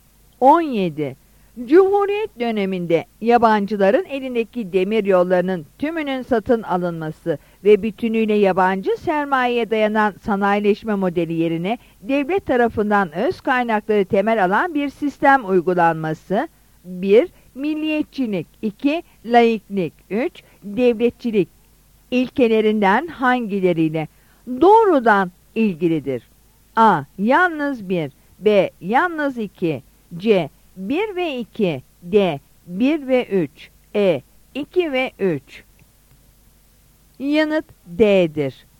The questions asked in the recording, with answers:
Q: Devletçilik ilkelerinden hangileriyle doğrudan ilgilidir?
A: Yanıt D'dir.